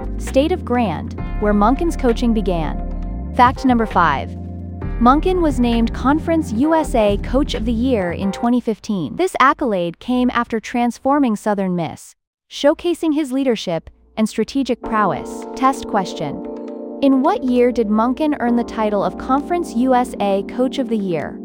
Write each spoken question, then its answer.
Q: In what year did Monken earn the title of Conference USA Coach of the Year?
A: Correct answer, 2015.